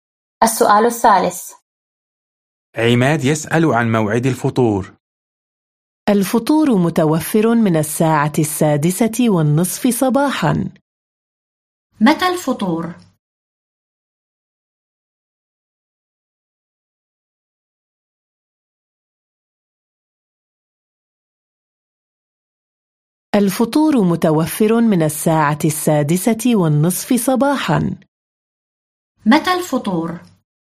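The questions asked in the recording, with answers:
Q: متى الفطور؟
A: من الساعة 6:30 صباحاً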